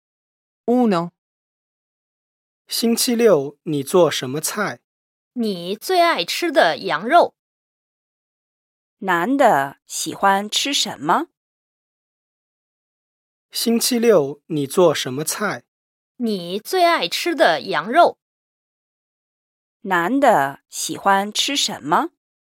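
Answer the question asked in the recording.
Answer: 羊肉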